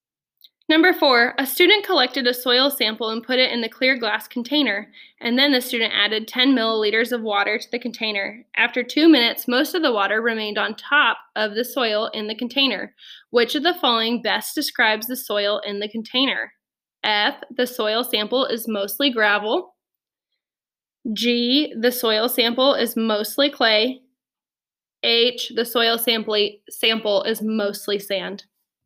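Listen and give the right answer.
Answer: G: the soil sample is mostly clay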